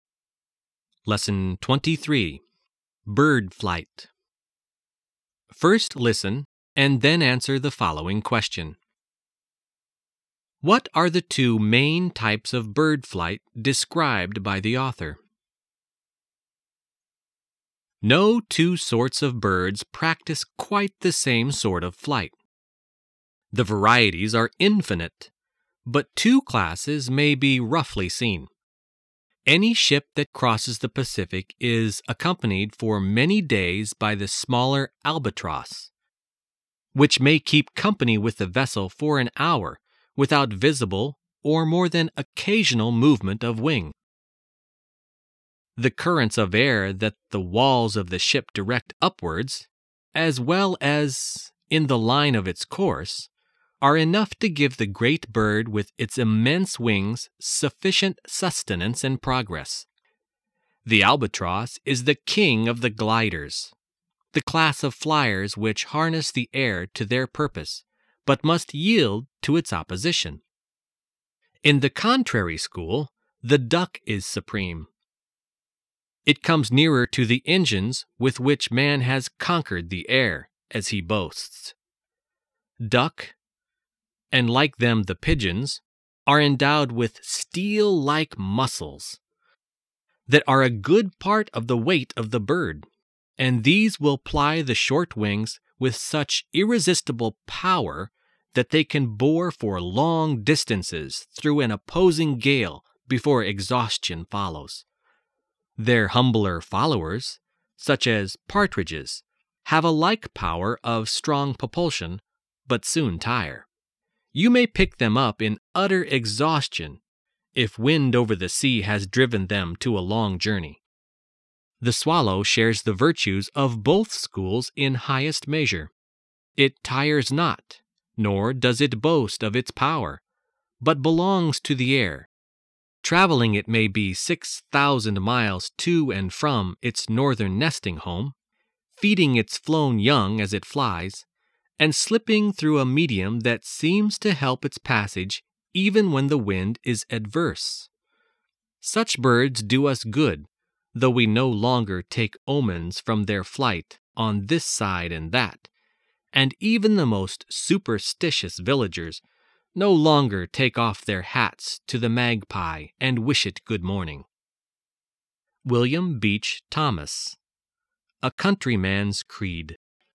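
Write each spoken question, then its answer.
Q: What are the two main types of bird flight described by the author?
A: Gliding (like the albatross, using air currents) and powered flapping flight (like the duck, with strong muscles driving short wings)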